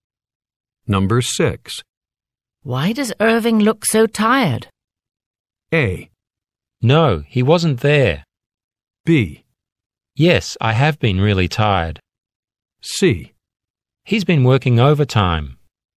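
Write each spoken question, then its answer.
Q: Why does Irving look so tired?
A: C: He's been working overtime.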